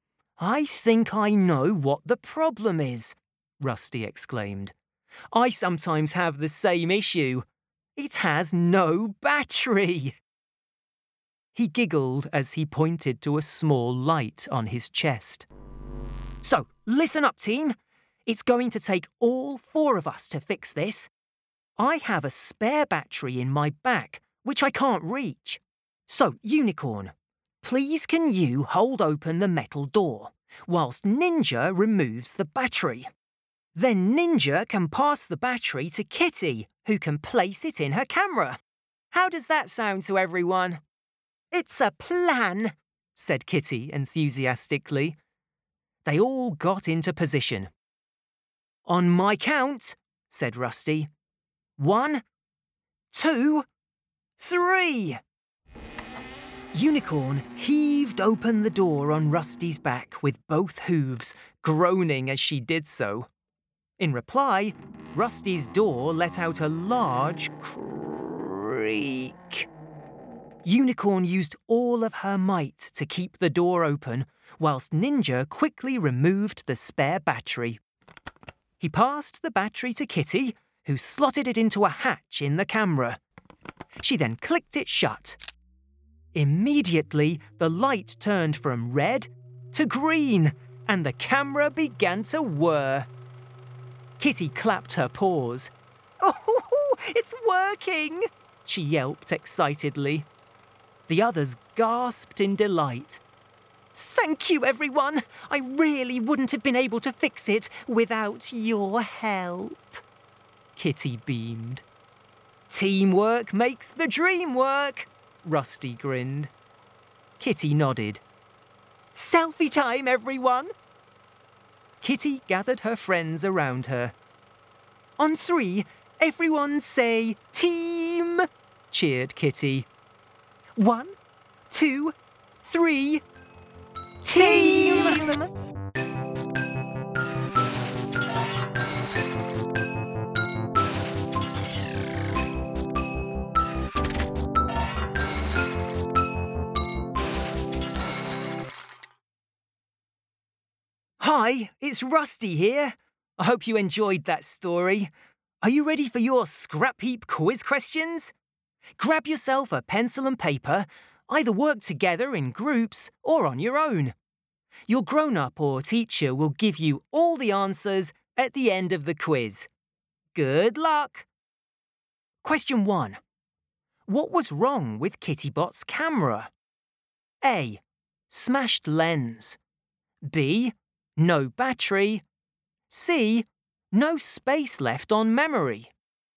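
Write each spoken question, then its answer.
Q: What was wrong with Kittybot's camera?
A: B: No battery.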